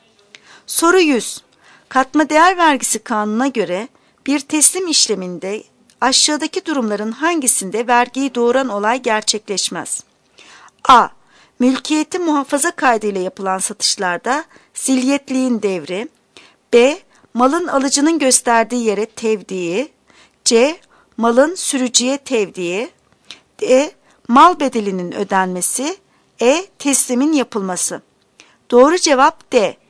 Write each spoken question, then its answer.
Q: Katma değer vergisi kanununa göre bir teslim işleminde aşağıdaki durumların hangisinde vergiyi doğuran olay gerçekleşmez?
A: Doğru cevap D. Mal bedelinin ödenmesi.